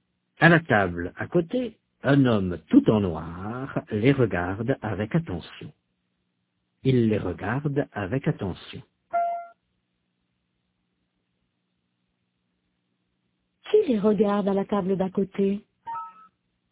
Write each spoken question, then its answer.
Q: Qui les regarde à la table d'à côté?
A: Un homme tout en noir.